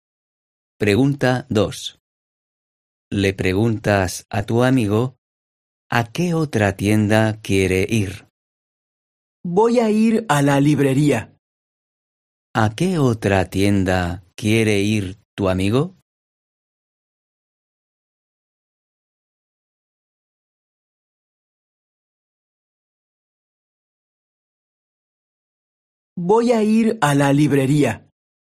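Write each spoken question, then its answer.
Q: ¿A qué otra tienda quiere ir tu amigo?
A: a la librería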